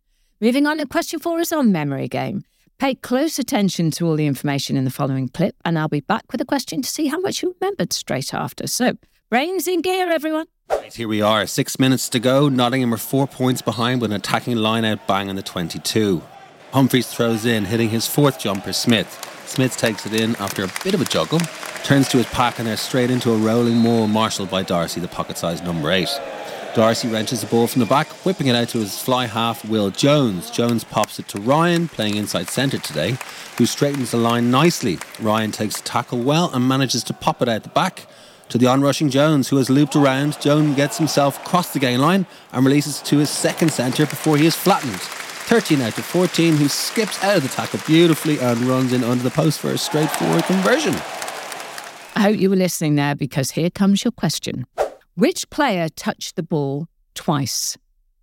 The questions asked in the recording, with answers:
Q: Which player touched the ball twice?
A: the name you heard twice was Will Jones.